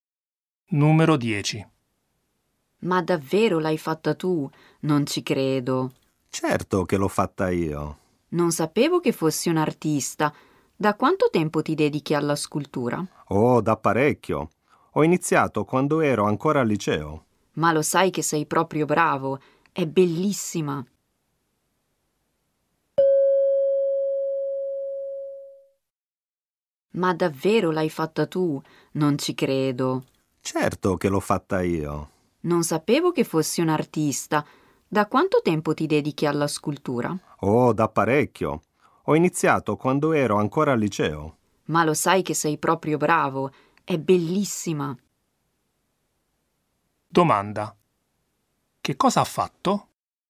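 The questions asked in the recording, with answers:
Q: che cosa ha fatto?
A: Una scultura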